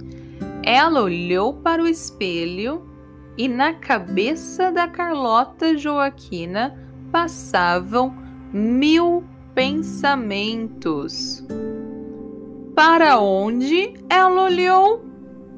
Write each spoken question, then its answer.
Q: Para onde ela olhou?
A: Ela olhou para o espelho.